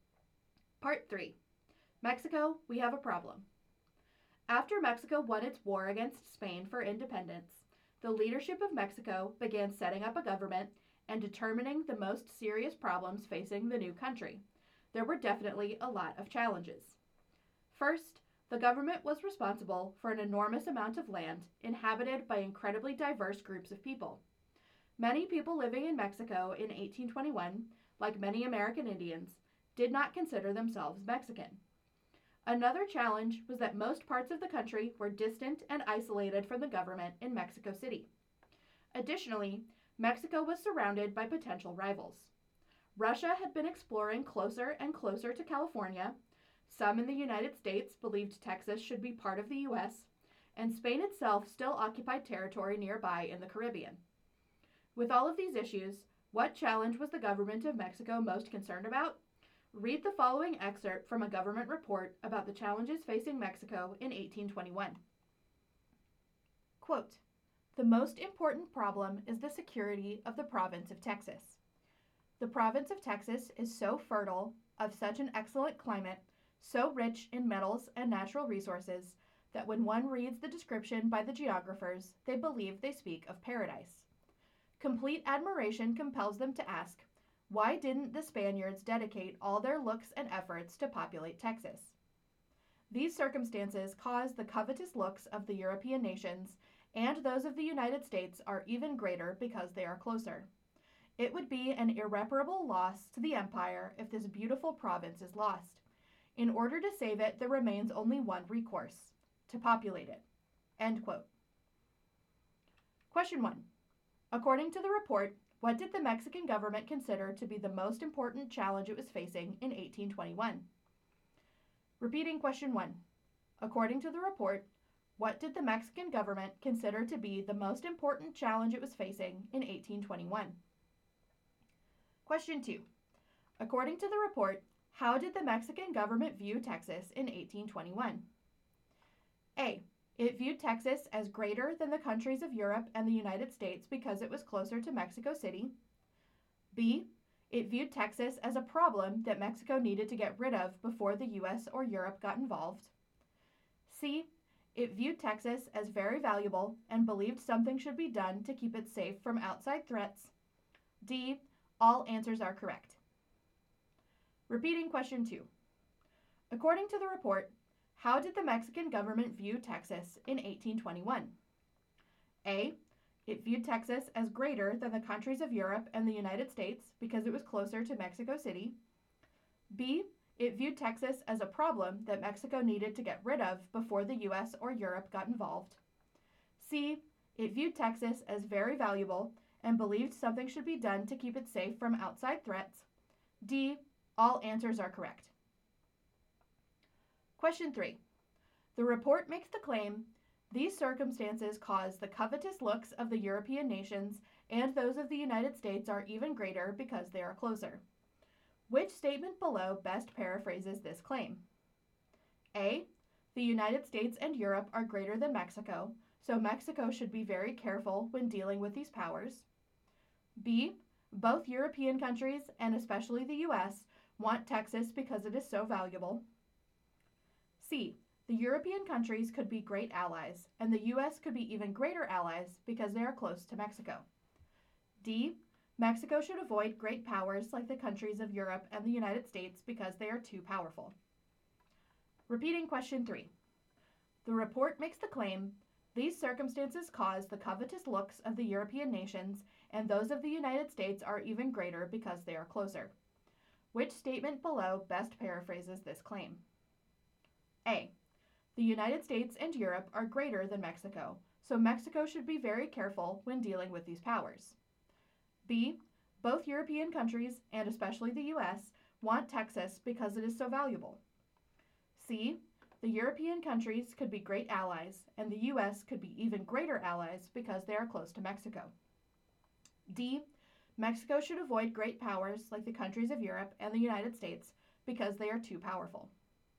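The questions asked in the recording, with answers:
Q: According to the report, what did the Mexican government consider to be the most important challenge it was facing in 1821?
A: The security of the province of Texas

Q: According to the report, how did the Mexican government view Texas in 1821?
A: C: It viewed Texas as very valuable and believed something should be done to keep it safe from outside threats.

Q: Which statement below best paraphrases this claim?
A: B: Both European countries, and especially the U.S., want Texas because it is so valuable.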